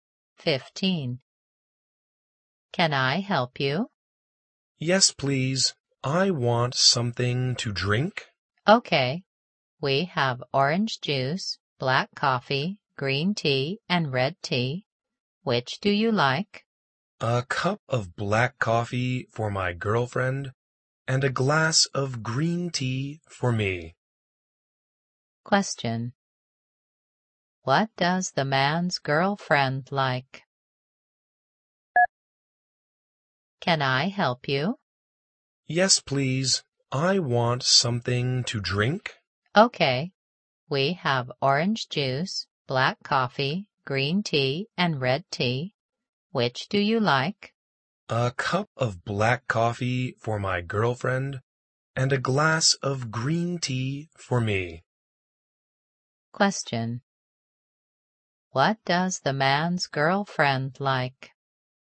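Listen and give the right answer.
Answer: Black coffee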